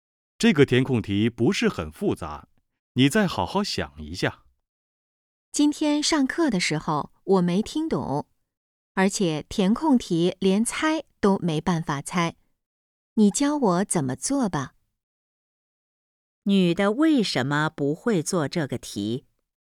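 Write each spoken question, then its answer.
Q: 女的为什么不会做这个题?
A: 上课时没听懂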